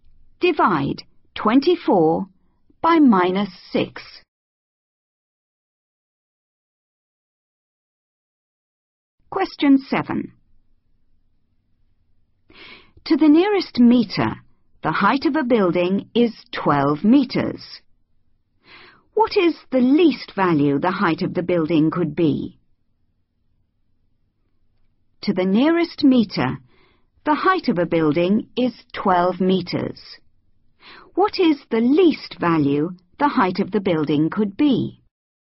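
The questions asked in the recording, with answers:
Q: What is the least value the height of the building could be?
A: 11.5 metres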